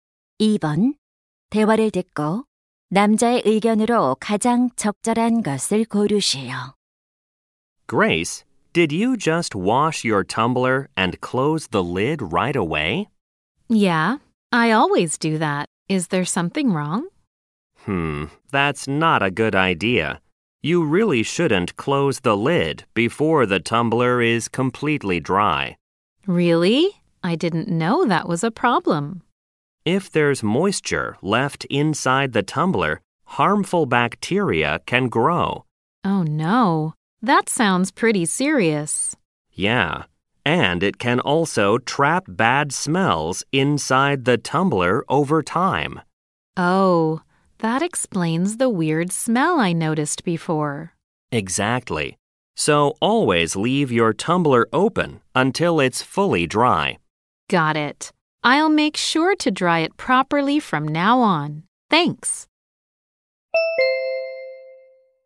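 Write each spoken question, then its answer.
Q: 대화를 듣고 남자의 의견으로 가장 적절한 것을 고르시오.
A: 텀블러는 완전히 건조한 후 뚜껑을 닫아야 한다.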